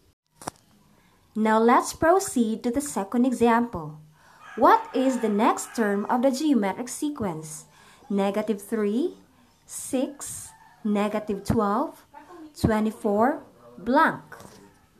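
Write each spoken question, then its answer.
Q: What is the next term of the geometric sequence?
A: -48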